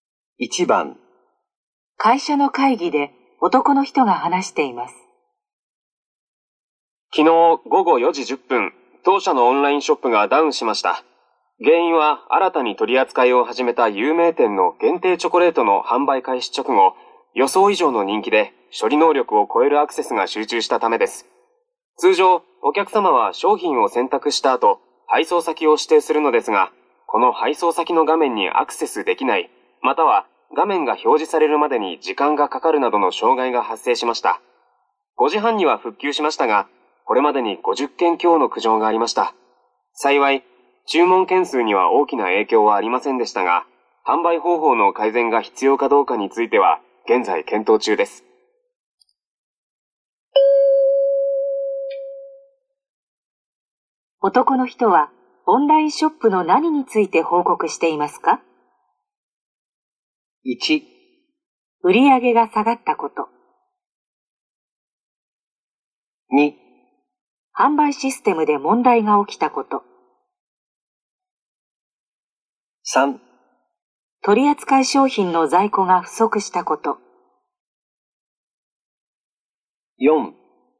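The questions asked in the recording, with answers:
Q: 男の人はオンラインショップの何について報告していますか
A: 2: 販売システムで問題が起きたこと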